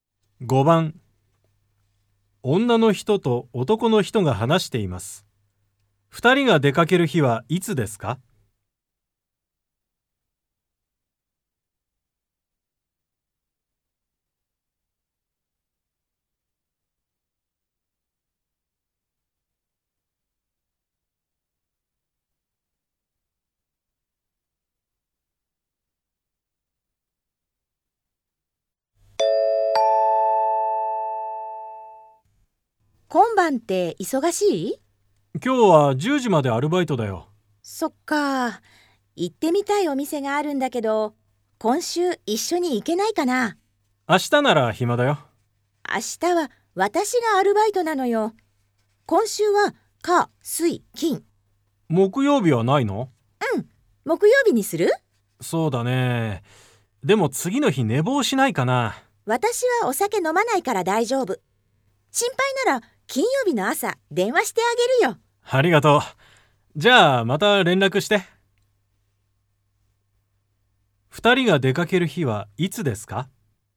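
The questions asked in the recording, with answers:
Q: 2人が出かける日はいつですか?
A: 木曜日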